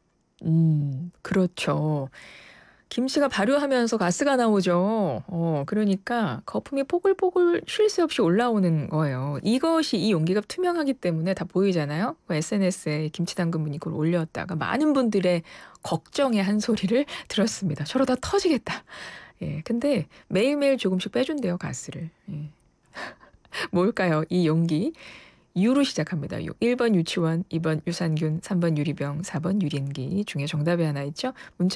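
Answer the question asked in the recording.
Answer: 3: 유리병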